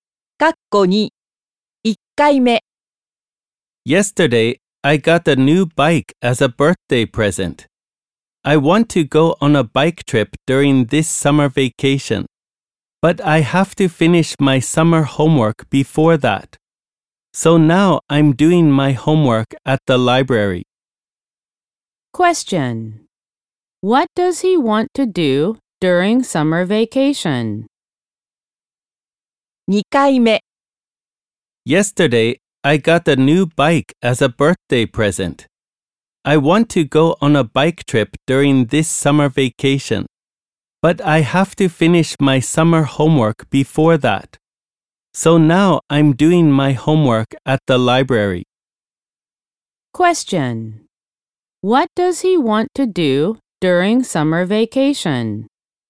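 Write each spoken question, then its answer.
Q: What does he want to do during summer vacation?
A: Go on a bike trip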